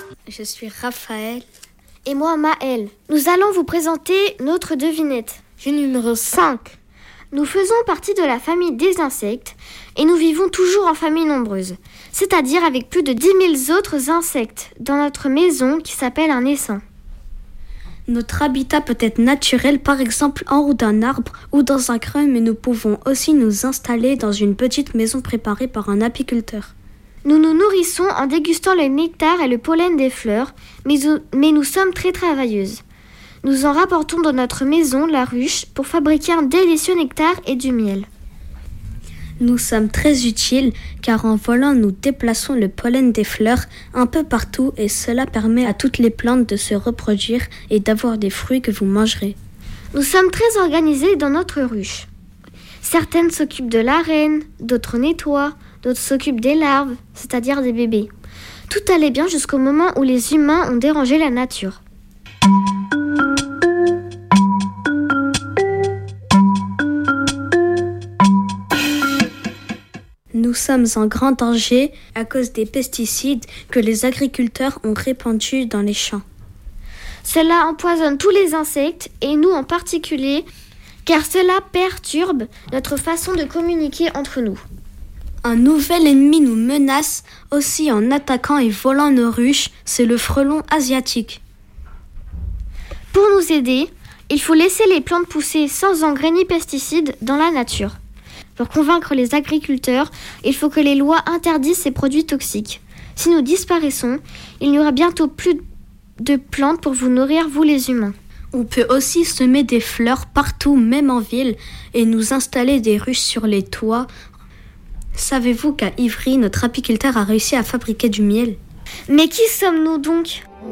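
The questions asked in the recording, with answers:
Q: Mais qui sommes-nous donc ?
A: les abeilles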